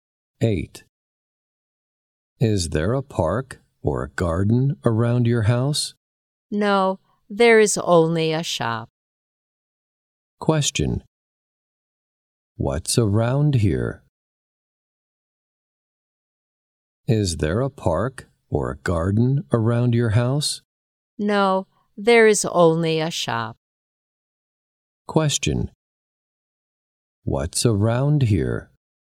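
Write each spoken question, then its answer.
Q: What's around here?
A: Only a shop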